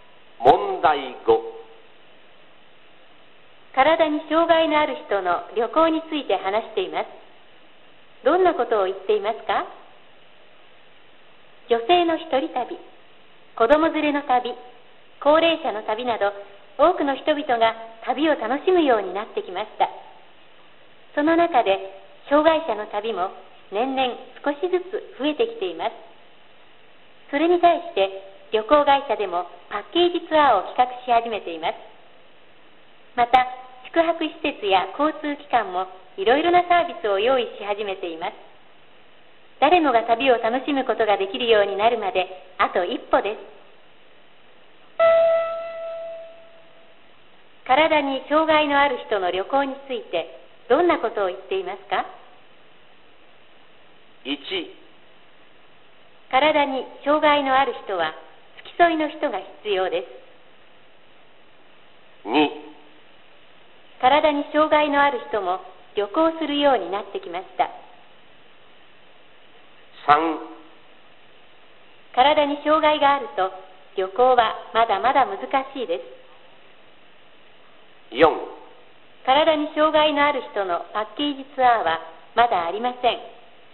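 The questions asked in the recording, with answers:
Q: 体に障害のある人の旅行についてどんなことを言っていますか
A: 2: 体に障害のある人も旅行するようになってきました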